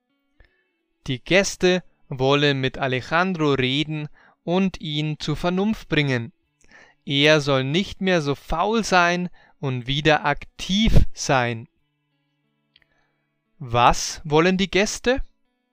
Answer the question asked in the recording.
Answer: Die Gäste wollen mit Alejandro reden und ihn zur Vernunft bringen.